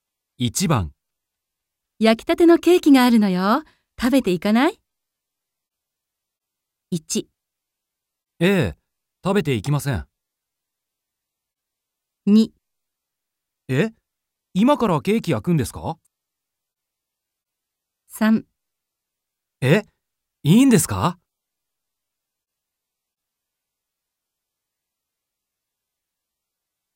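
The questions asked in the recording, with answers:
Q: 焼きたてのケーキがあるのよ。食べていかない?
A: 3: え?いいんですか?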